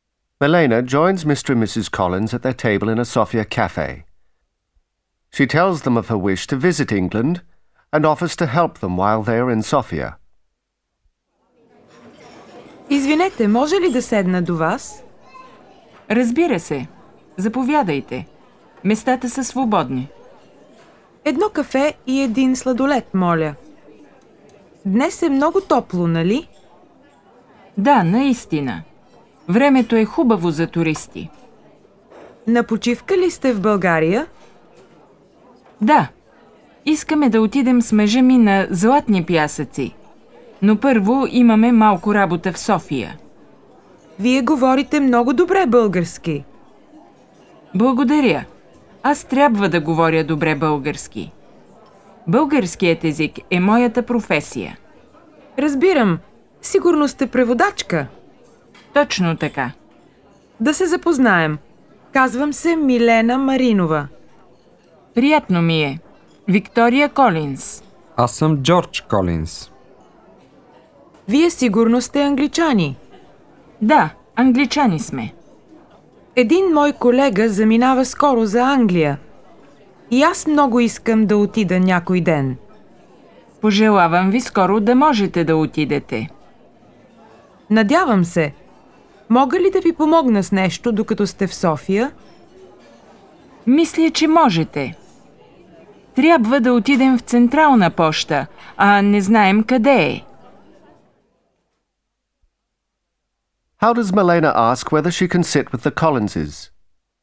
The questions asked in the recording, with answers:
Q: How does Milena ask whether she can sit with the Collinses?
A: Извинете, може ли да седна до вас?